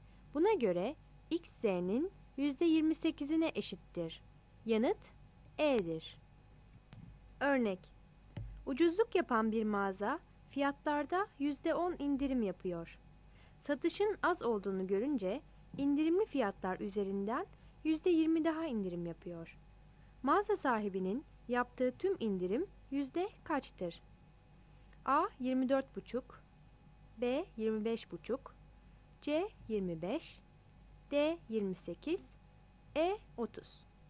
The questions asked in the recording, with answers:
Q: Mağaza sahibinin yaptığı tüm indirim yüzde kaçtır?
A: Yanıt D'dir.